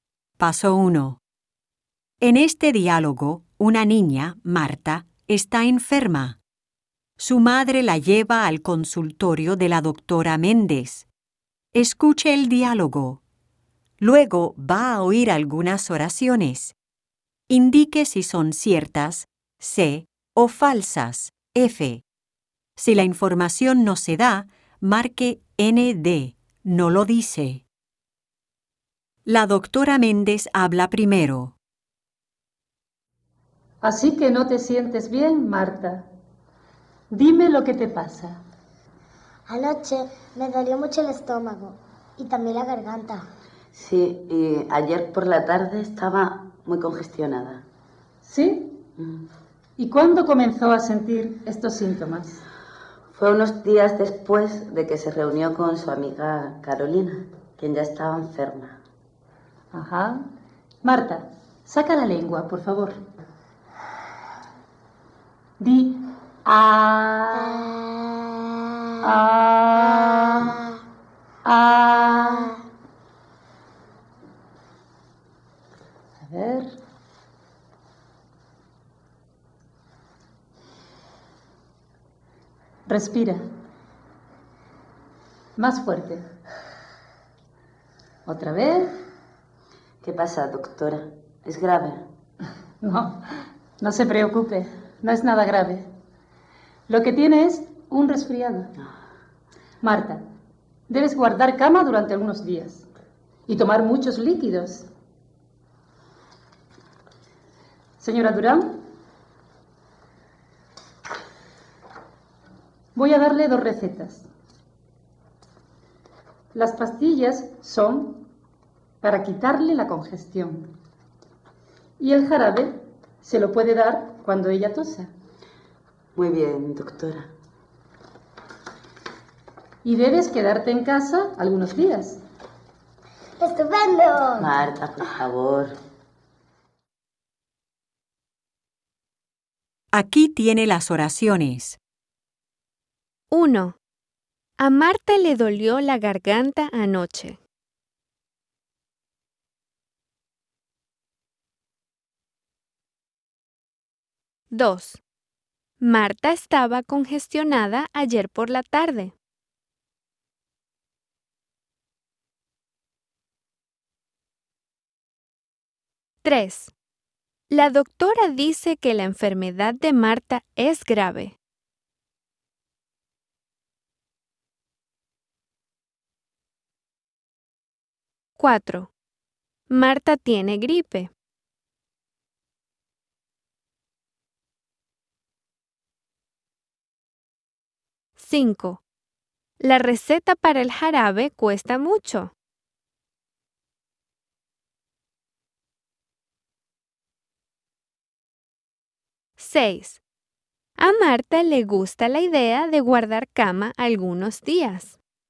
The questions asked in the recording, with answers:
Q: A Marta le dolió la garganta anoche.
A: Cierto.

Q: Marta estaba congestionada ayer por la tarde.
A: Cierto.

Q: La doctora dice que la enfermedad de Marta es grave.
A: Falso.

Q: Marta tiene gripe.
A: Falso.

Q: La receta para el jarabe cuesta mucho.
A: No lo dice.

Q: A Marta le gusta la idea de guardar cama algunos días.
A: Cierto.